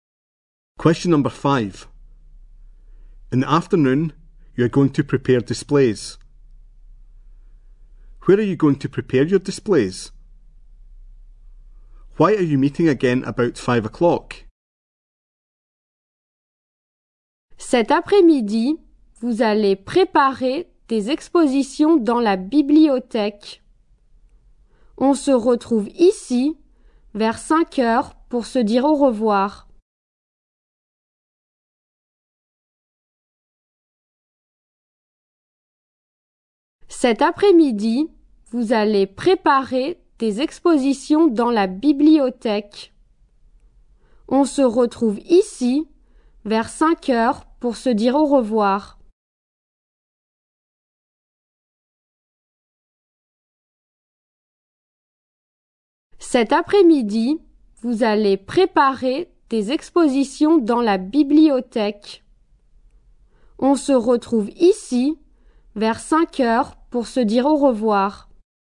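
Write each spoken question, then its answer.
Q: Where are you going to prepare your displays?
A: In the library

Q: Why are you meeting again about 5 o'clock?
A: To say goodbye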